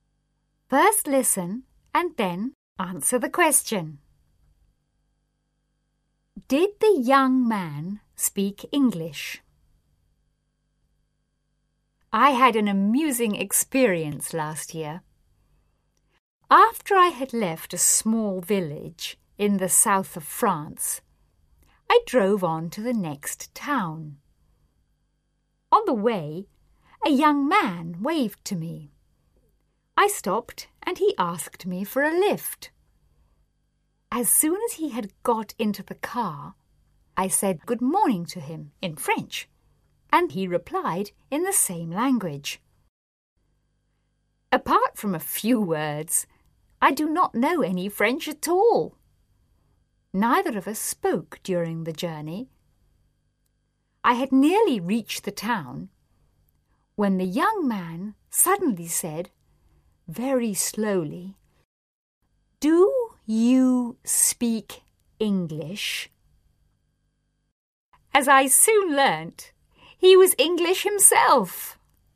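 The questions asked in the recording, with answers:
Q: Did the young man speak English?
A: Yes, he was English himself.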